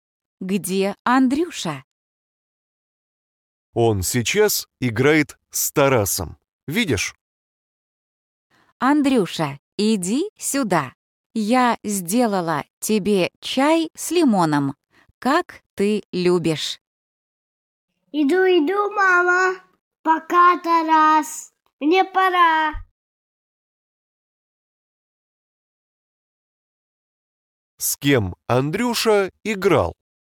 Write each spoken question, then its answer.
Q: С кем Андрюша играл?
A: Да, с Тарасом.